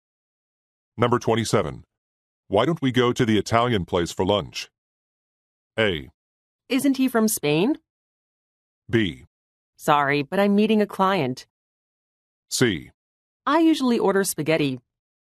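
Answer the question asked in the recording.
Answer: B: Sorry, but I'm meeting a client.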